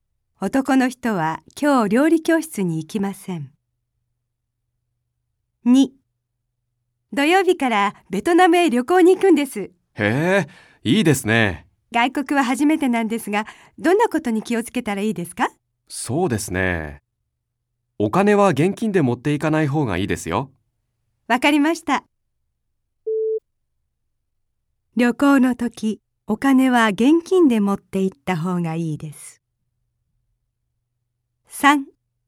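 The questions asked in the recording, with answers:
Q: 旅行の時、お金は現金で持って行った方がいいです。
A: ×(正しくない)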